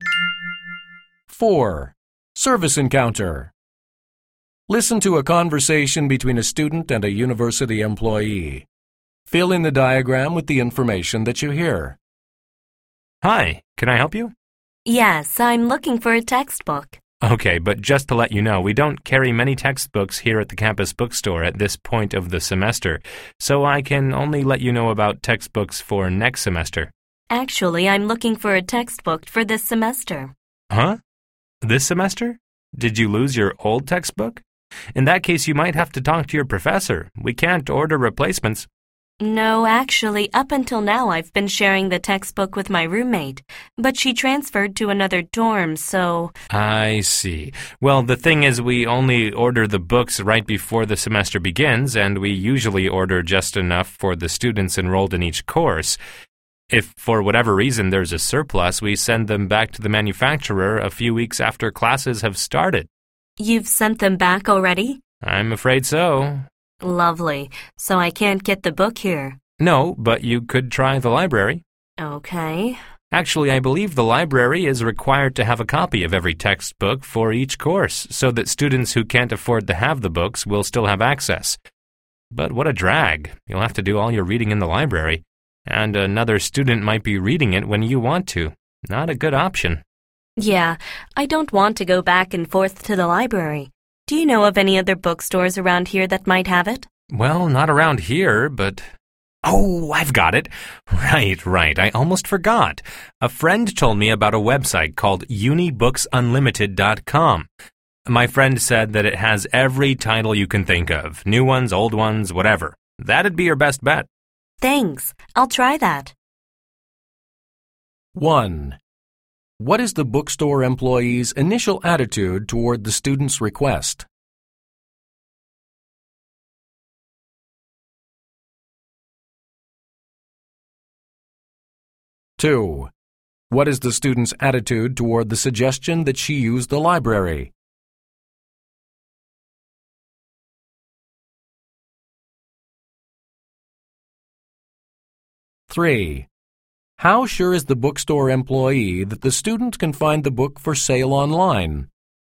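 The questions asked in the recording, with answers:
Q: What is the student's attitude toward the suggestion that she use the library?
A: Negative; she doesn't want to go back and forth to the library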